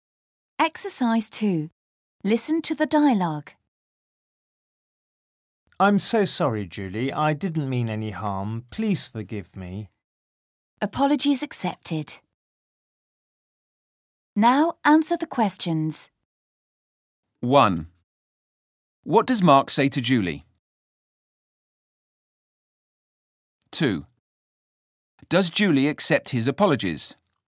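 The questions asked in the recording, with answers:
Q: What does Mark say to Julie?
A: He says he's so sorry, he didn't mean any harm, and asks her to forgive him.

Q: Does Julie accept his apologies?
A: Yes, she does.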